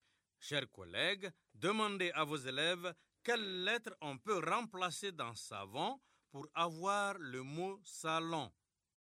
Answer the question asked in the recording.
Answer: Dans savon, on remplace la lettre V par la lettre L pour avoir salon.